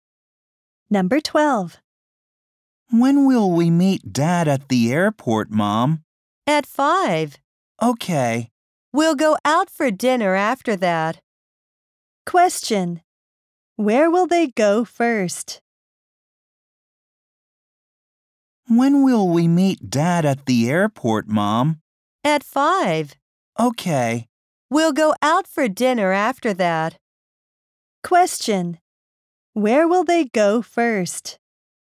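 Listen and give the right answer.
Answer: To the airport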